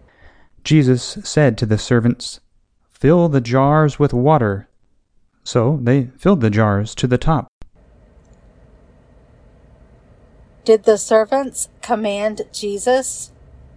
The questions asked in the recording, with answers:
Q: Did the servants command Jesus?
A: No, Jesus commanded the servants.